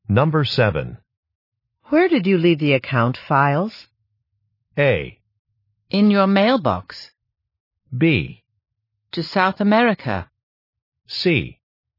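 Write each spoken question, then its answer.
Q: Where did you leave the account files?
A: A: In your mailbox.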